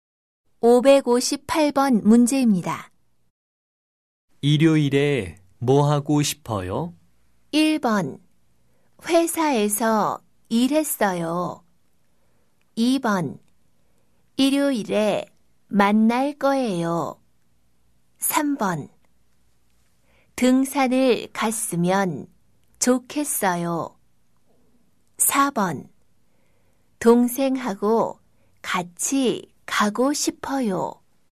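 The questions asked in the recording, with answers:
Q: 일요일에 뭐 하고 싶어요?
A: 3: 등산을 갔으면 좋겠어요.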